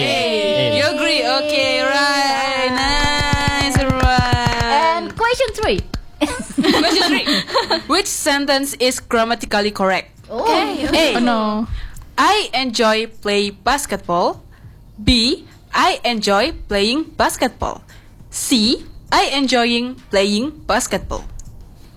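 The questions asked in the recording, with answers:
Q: Which sentence is grammatically correct?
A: B: I enjoy playing basketball.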